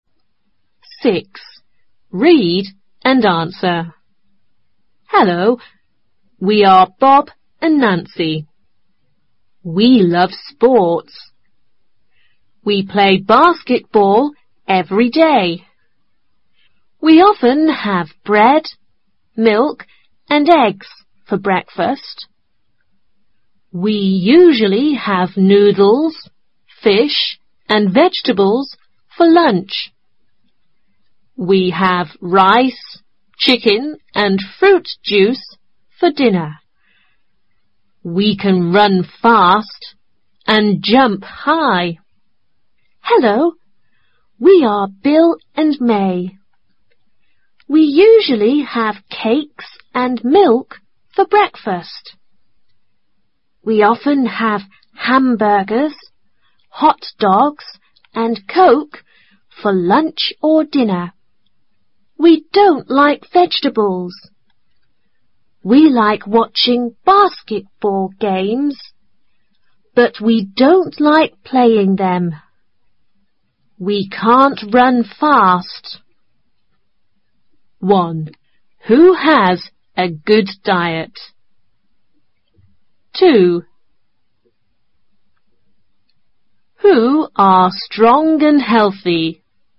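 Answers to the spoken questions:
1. Bob and Nancy
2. Bob and Nancy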